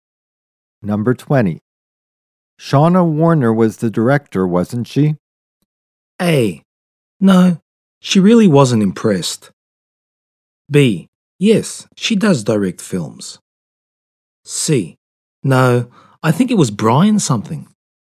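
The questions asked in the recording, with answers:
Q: Shauna Warner was the director, wasn't she?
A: C: No, I think it was Brian something.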